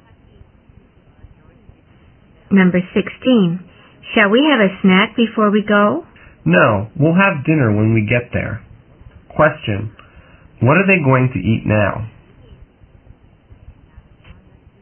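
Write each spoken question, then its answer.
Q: What are they going to eat now?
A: Nothing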